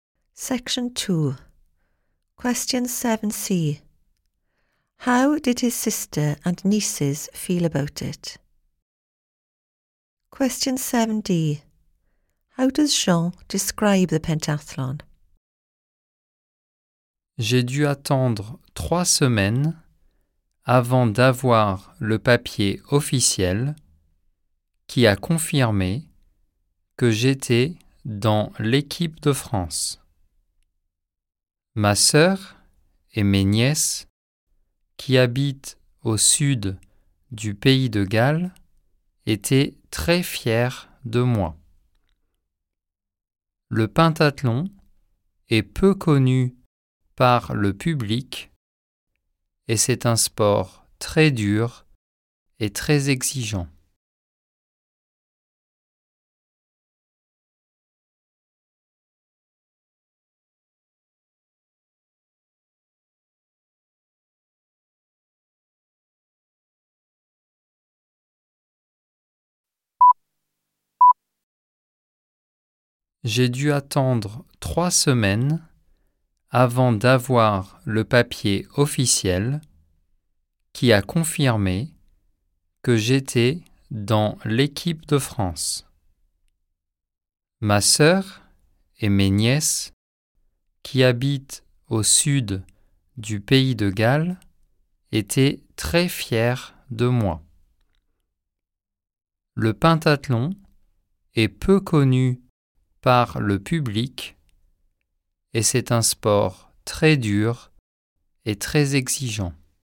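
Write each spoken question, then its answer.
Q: How did his sister and nieces feel about it?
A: Very proud

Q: How does Jean describe the pentathlon?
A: Little known, very hard and demanding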